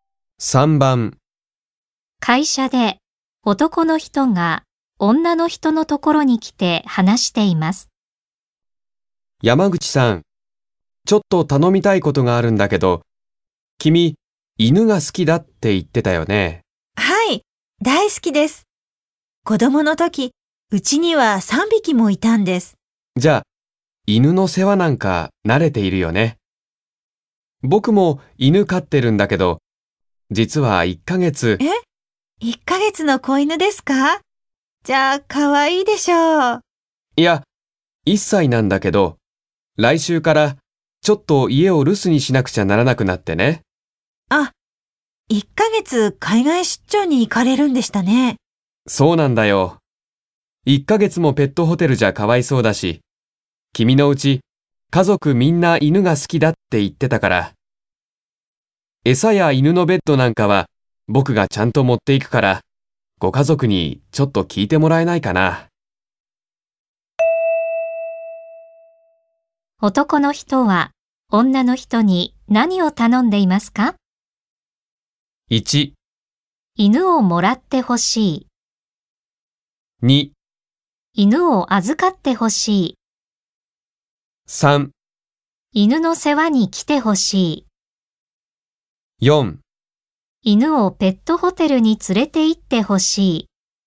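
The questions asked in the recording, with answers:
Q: 男の人は女の人に何を頼んでいますか?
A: 2: 犬を預かってほしい。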